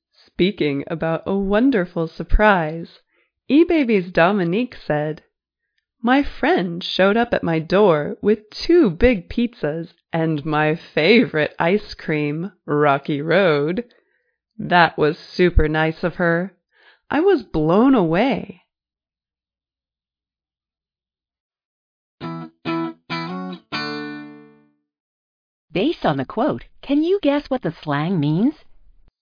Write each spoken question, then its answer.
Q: Based on the quote, can you guess what the slang means?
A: Blown away is an expression meaning very impressed, amazed.